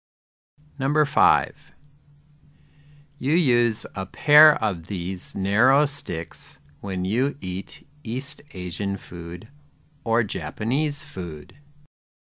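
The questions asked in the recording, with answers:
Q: You use a pair of these narrow sticks when you eat East Asian food or Japanese food.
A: chopsticks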